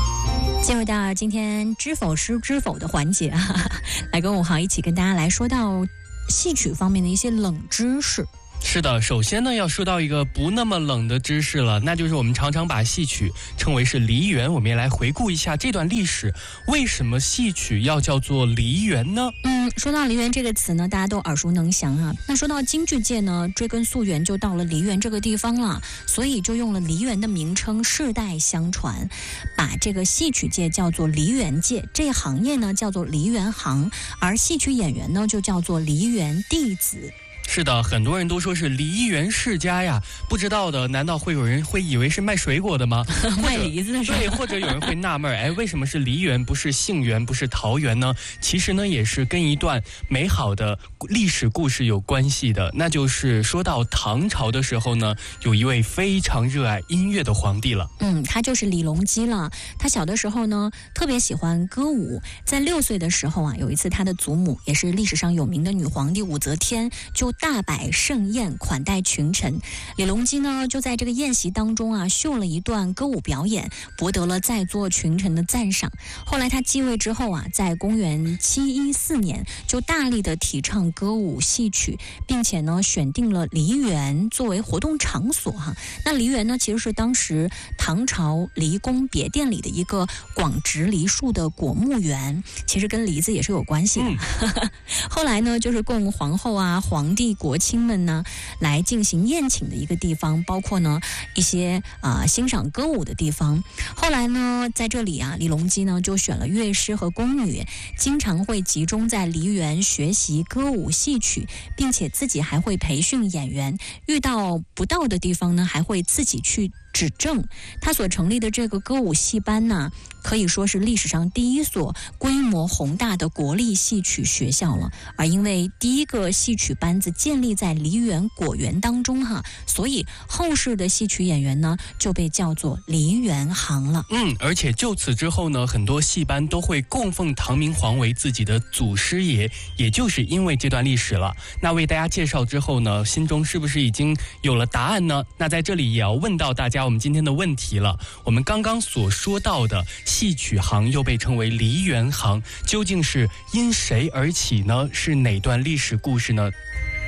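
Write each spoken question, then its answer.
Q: 我们刚刚所说到的戏曲行又被称为梨园行,究竟是因谁而起呢?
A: 唐明皇李隆基(他在梨园设立歌舞戏班)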